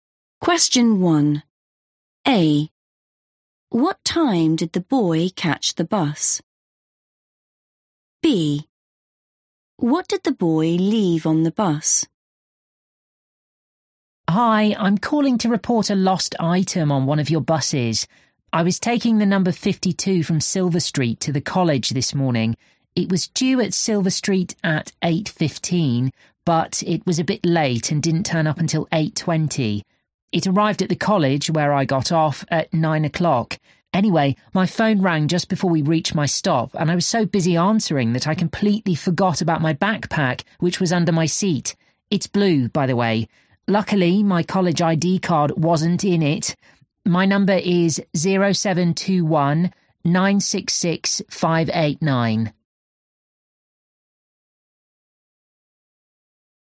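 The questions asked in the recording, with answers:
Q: What time did the boy catch the bus?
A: 8:20

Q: What did the boy leave on the bus?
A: blue backpack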